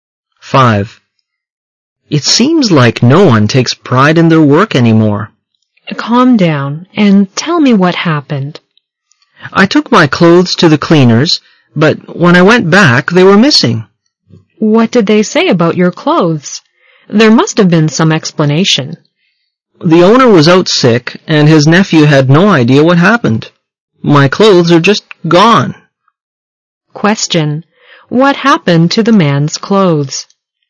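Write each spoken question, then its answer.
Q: What happened to the man's clothes?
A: They went missing at the dry cleaners.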